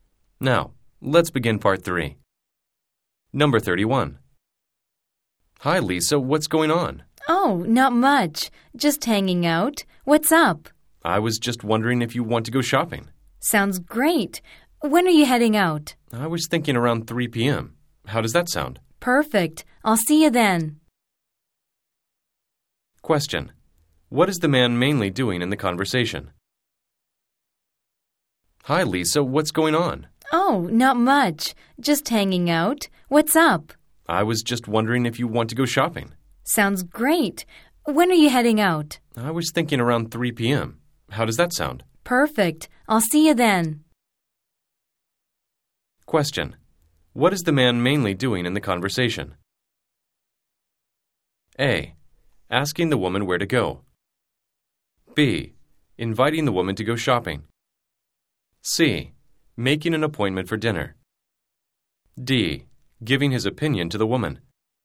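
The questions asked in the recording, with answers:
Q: What is the man mainly doing in the conversation?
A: B: Inviting the woman to go shopping.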